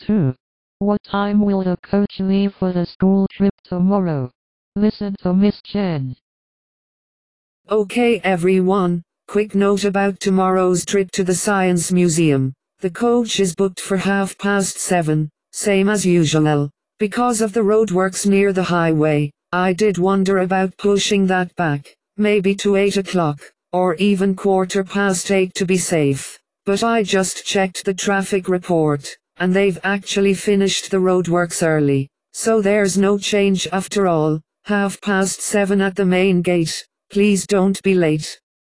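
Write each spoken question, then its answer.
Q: What time will the coach leave for the school trip tomorrow?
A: 7:30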